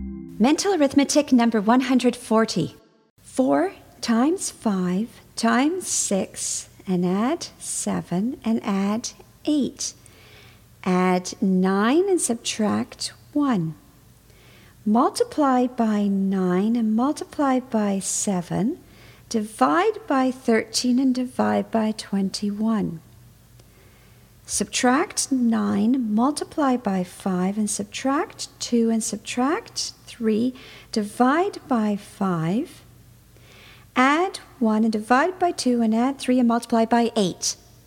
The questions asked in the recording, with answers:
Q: 4 times 5 times 6 and add 7 and add 8. Add 9 and subtract 1. Multiply by 9 and multiply by 7. Divide by 13 and divide by 21. Subtract 9, multiply by 5, and subtract 2, and subtract 3, divide by 5, add 1, and divide by 2, and add 3, and multiply by 8.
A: And the answer is 120.